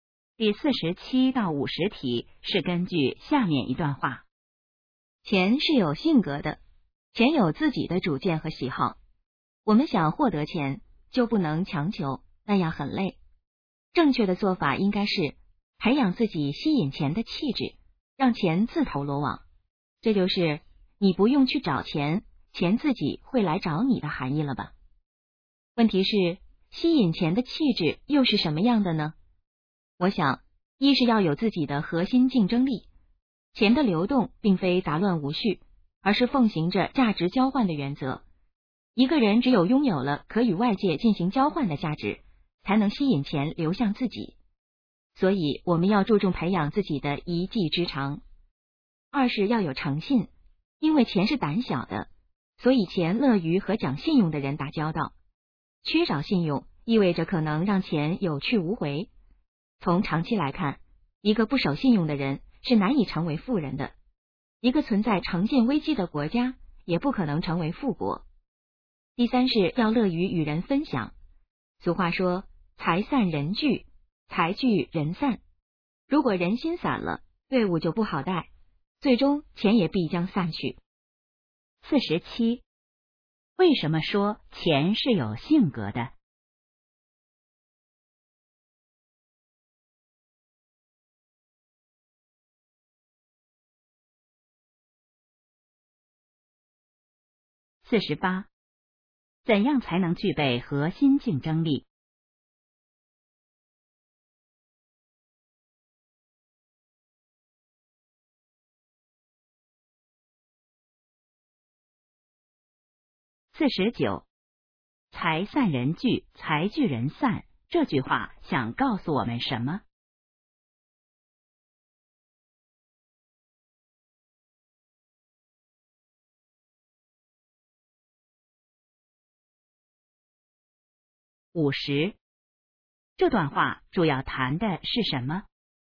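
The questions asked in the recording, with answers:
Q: 为什么说钱是有性格的?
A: 钱有自己的主见和喜好

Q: 怎样才能具备核心竞争力?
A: 培养自己的一技之长

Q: 财散人聚,财聚人散,这句话想告诉我们什么?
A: 要乐于与人分享

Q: 这段话主要谈的是什么?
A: 吸引钱的气质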